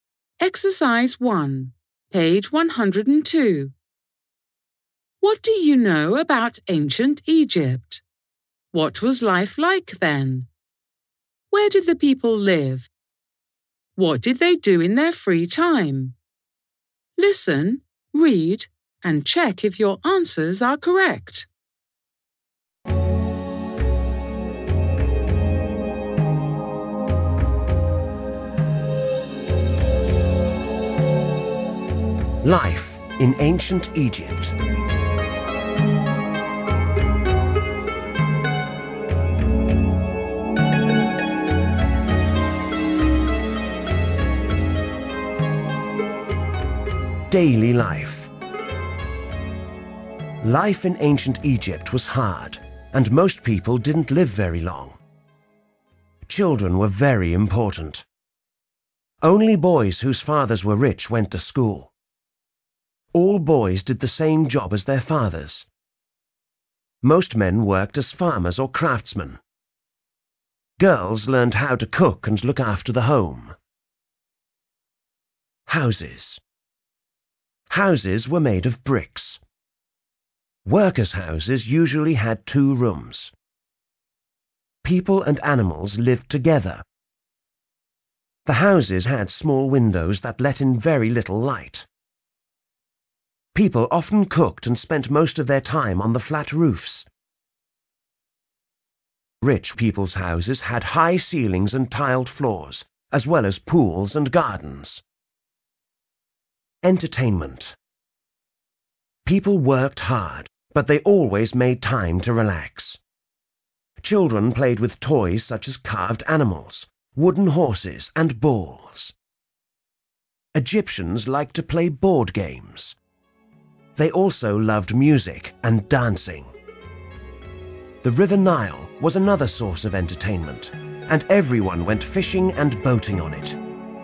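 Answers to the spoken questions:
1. Hard; most people didn't live very long
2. In brick houses, often together with animals
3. Played with toys and board games, enjoyed music and dancing, went fishing and boating on the Nile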